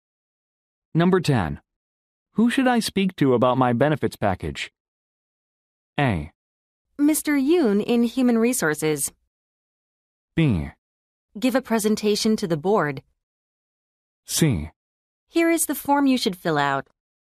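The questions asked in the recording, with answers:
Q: Who should I speak to about my benefits package?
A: A: Mr. Yoon in Human Resources.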